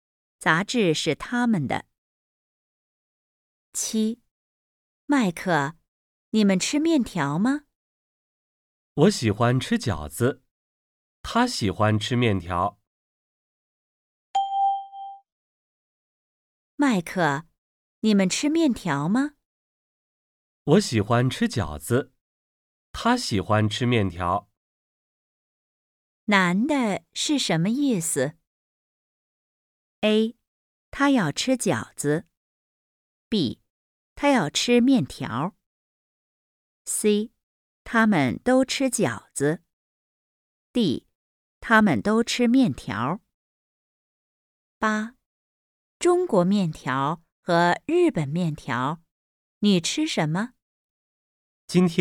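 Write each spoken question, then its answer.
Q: 男的是什么意思?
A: A: 他要吃饺子。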